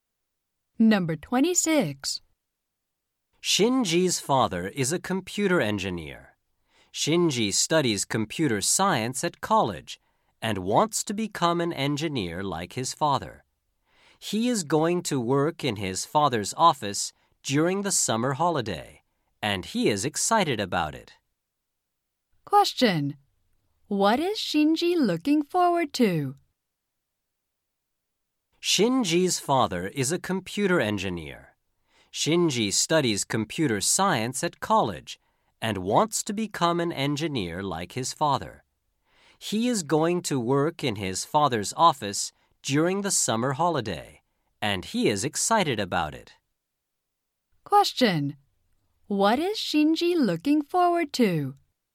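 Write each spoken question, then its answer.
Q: What is Shinji looking forward to?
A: Working in his father's office during the summer holiday.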